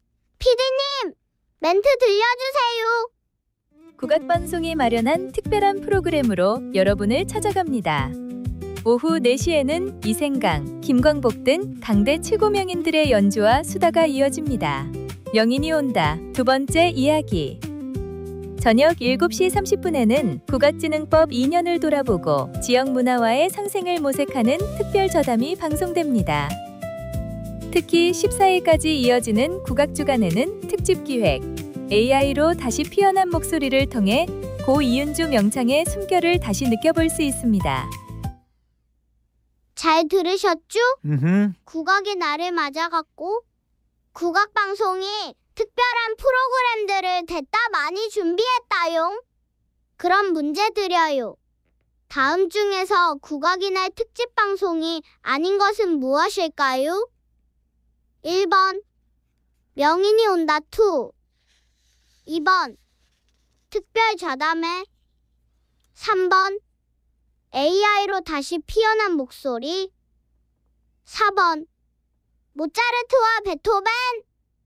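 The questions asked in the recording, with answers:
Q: 다음 중에서 국악의 날 특집방송이 아닌 것은 무엇일까요?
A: 4번: 모차르트와 베토벤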